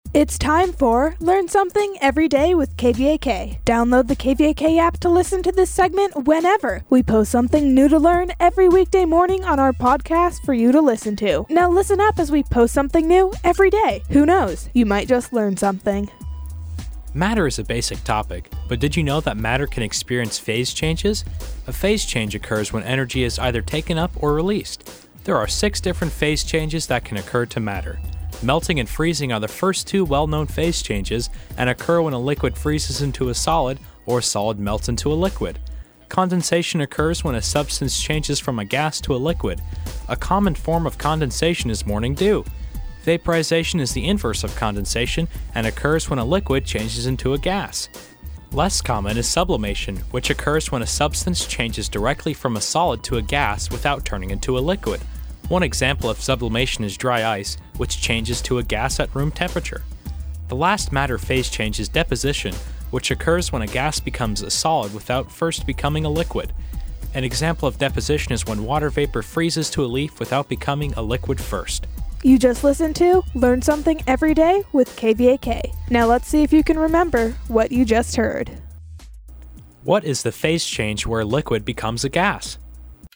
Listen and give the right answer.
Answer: The phase change where a liquid becomes a gas is called vaporization.